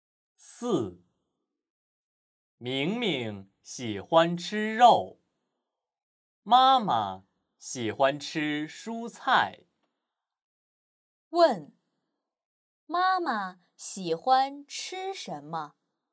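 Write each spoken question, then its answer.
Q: 问,妈妈喜欢吃什么?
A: 蔬菜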